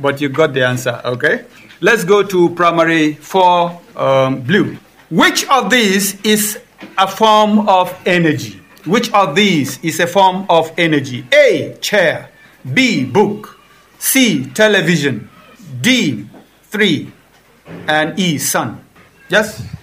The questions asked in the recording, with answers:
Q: Which of these is a form of energy?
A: E, sun.